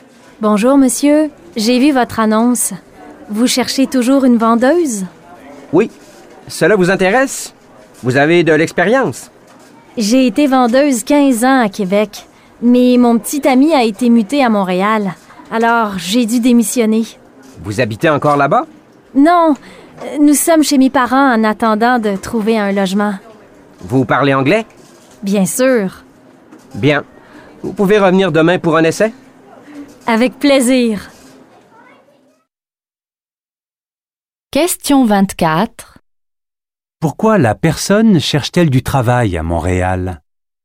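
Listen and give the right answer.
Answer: Parce que son petit ami a été muté à Montréal.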